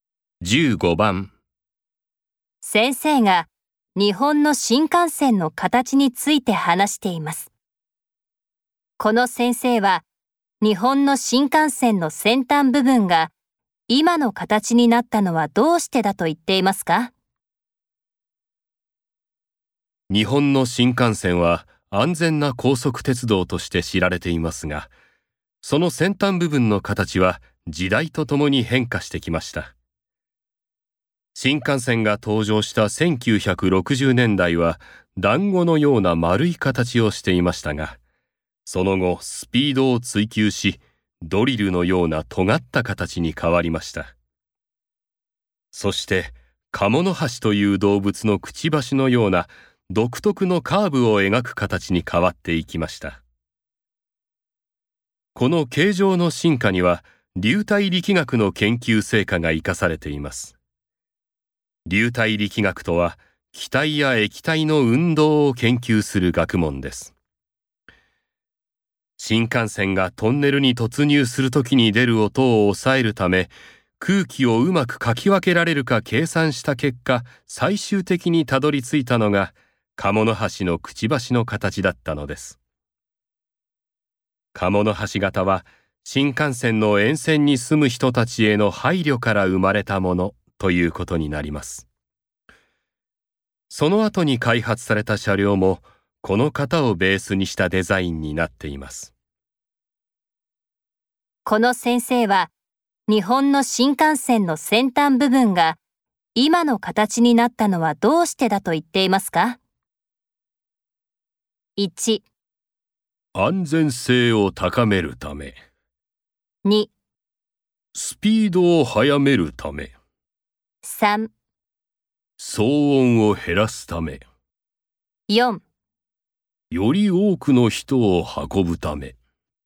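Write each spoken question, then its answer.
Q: この先生は日本の新幹線の先端部分が今の形になったのはどうしてだと言っていますか?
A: 3: 騒音を減らすため。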